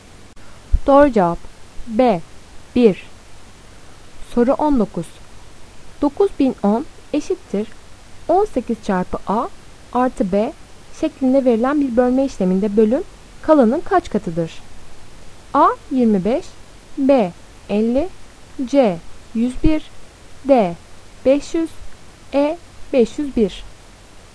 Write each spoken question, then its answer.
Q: 9010 eşittir 18 çarpı A artı B şeklinde verilen bir bölme işleminde bölüm kalanın kaç katıdır?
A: Doğru cevap B 50.